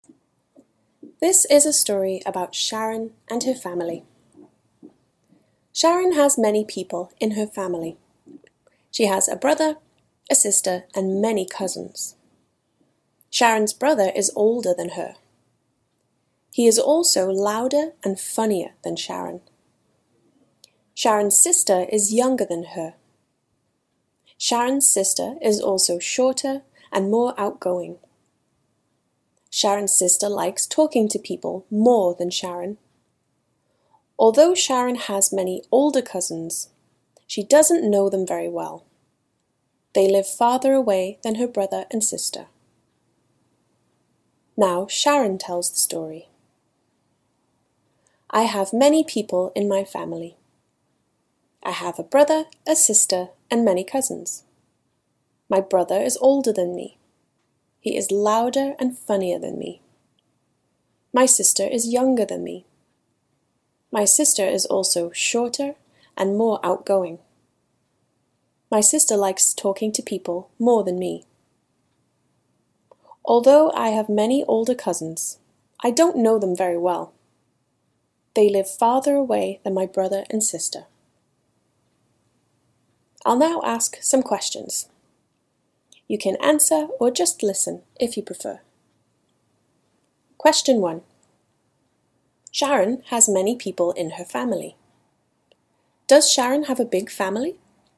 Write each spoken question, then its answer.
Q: Does Sharon have a big family?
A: Yes. Sharon has many people in her family.